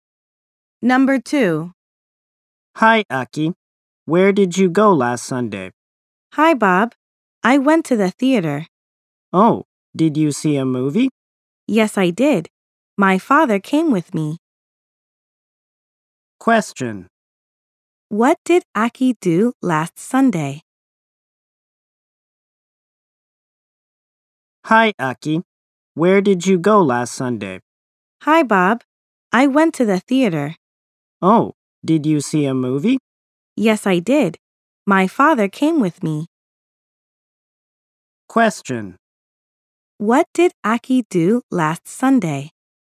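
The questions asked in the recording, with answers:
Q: What did Aki do last Sunday?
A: She saw a movie at the theater.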